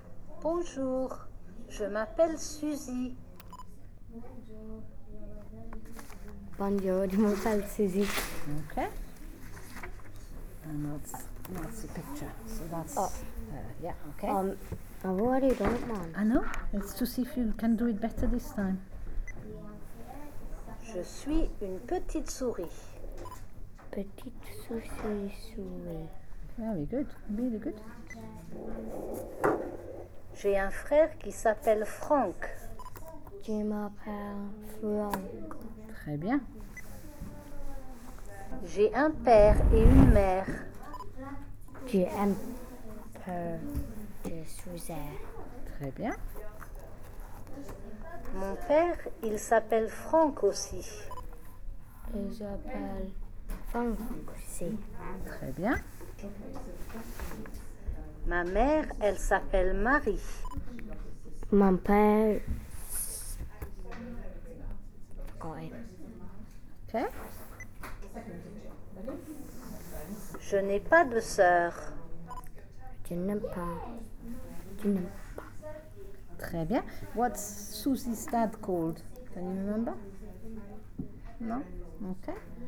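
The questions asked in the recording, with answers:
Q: What's Susie's dad called?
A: Franck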